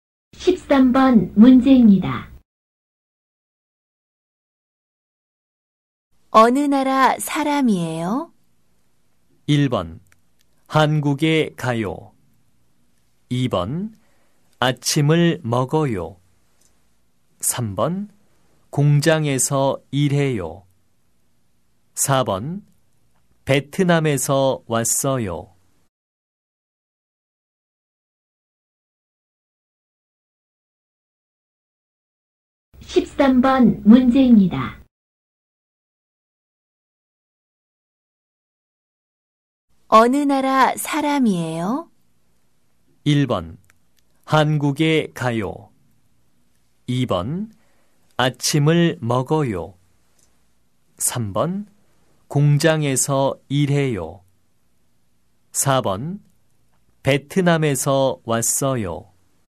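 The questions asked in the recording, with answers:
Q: 어느 나라 사람이에요?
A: 4: 베트남에서 왔어요.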